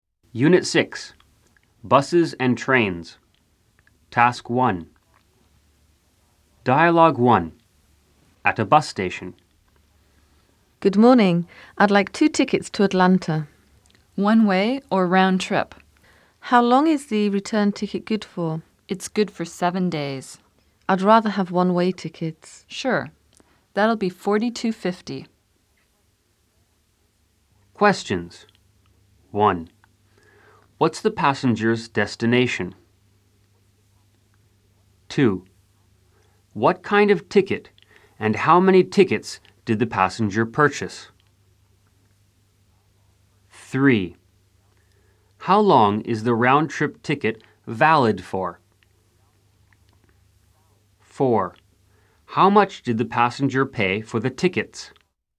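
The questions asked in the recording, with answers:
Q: What's the passenger's destination?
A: Atlanta

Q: What kind of ticket and how many tickets did the passenger purchase?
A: Two one-way tickets

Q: How long is the round-trip ticket valid for?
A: 7 days

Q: How much did the passenger pay for the tickets?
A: $42.50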